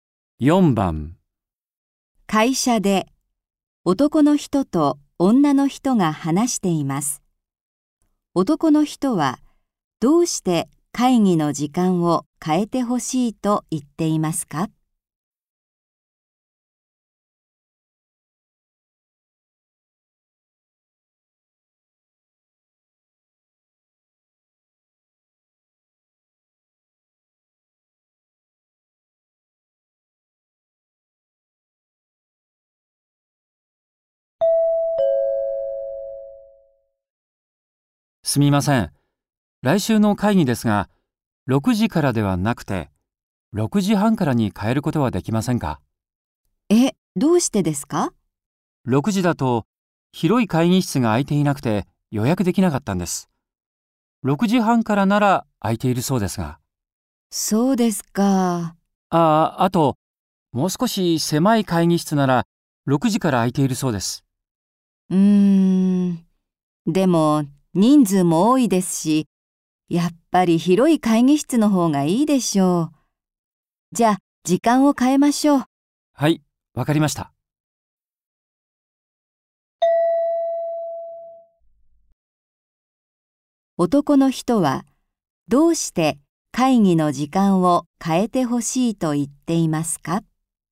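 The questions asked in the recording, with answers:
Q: 男の人は、どうして会議の時間を変えてほしいと言っていますか?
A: 6時だと広い会議室が予約できなかったから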